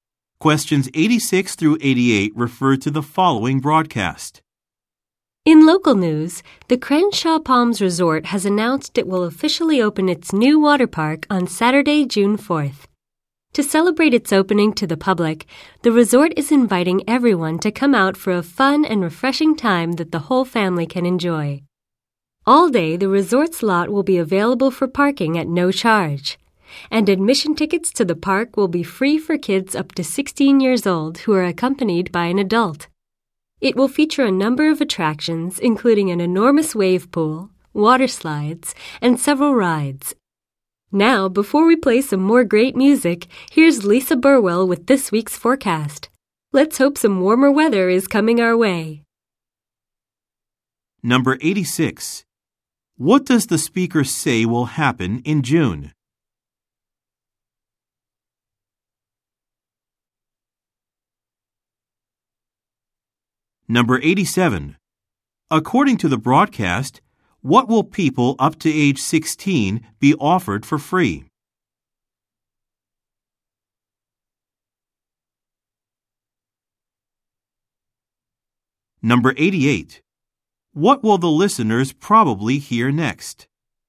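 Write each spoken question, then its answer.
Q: What does the speaker say will happen in June?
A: A resort water park will open

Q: According to the broadcast, what will people up to age 16 be offered for free?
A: Admission tickets to the water park

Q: What will the listeners probably hear next?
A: A weather forecast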